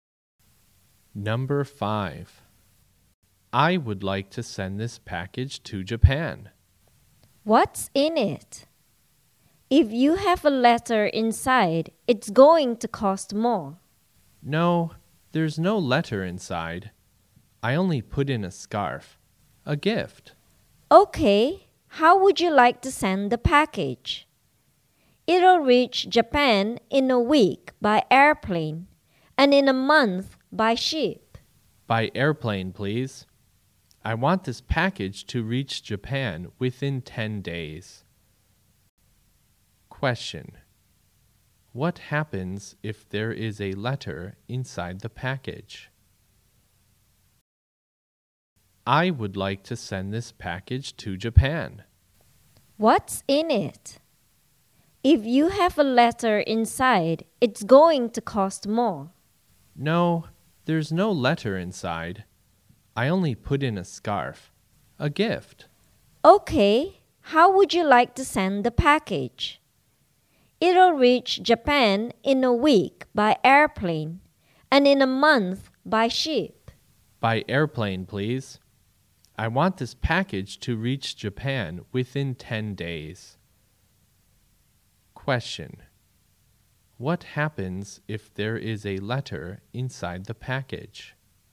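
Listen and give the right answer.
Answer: It will cost more to send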